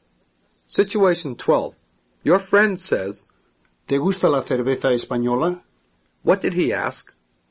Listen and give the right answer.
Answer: He asked, Do you like Spanish beer?